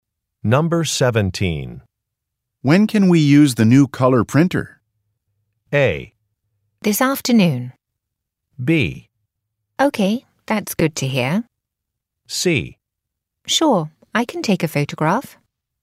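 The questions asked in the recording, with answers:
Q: When can we use the new color printer?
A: A: This afternoon.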